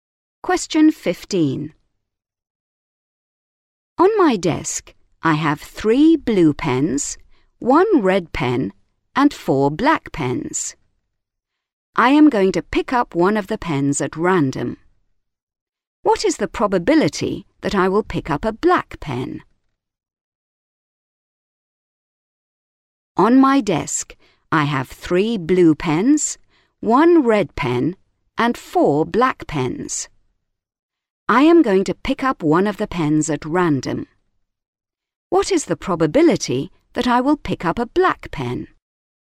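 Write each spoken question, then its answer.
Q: What is the probability that I will pick up a black pen?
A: 1/2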